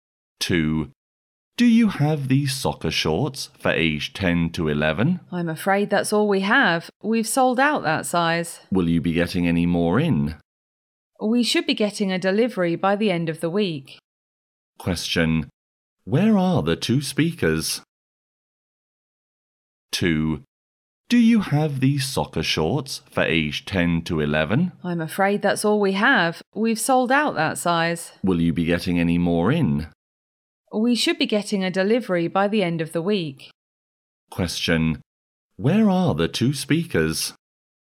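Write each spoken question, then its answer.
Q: Where are the two speakers?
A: In a shop (selling soccer shorts).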